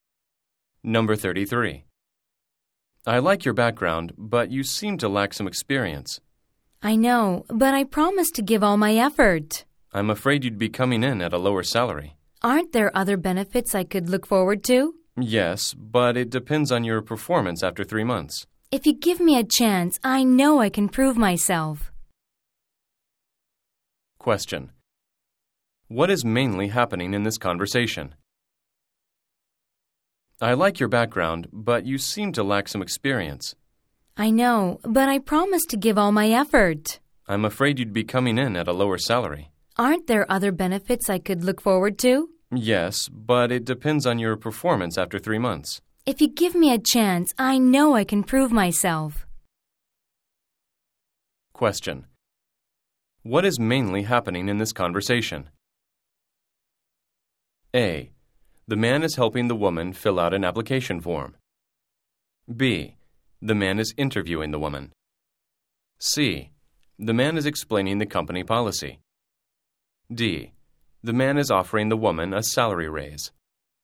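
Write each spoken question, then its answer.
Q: What is mainly happening in this conversation?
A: B: The man is interviewing the woman.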